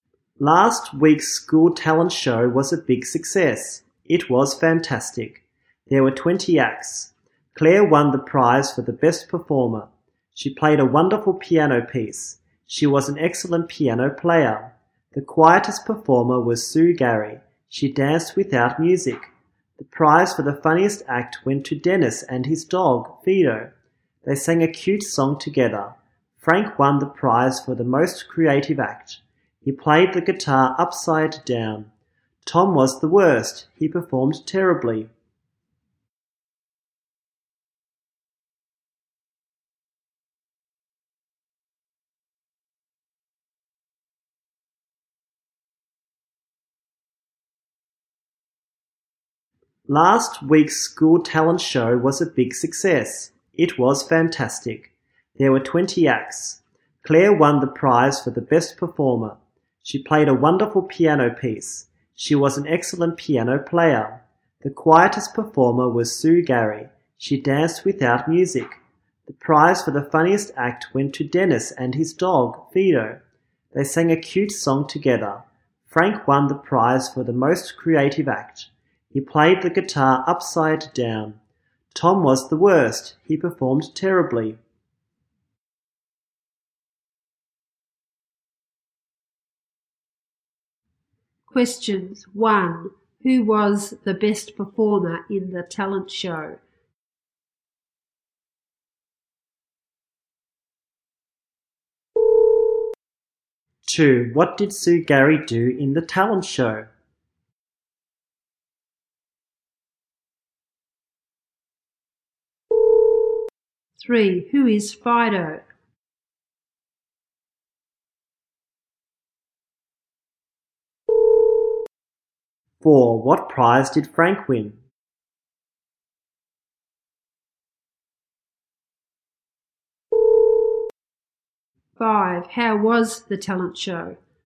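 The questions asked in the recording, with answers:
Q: Questions 1. Who was the best performer in the talent show?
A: Claire

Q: 2. What did Sue Gary do in the talent show?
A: She danced without music

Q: 3. Who is Fido?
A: Dennis's dog

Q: 4. What prize did Frank win?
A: The prize for the most creative act

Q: 5. How was the talent show?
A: A big success; fantastic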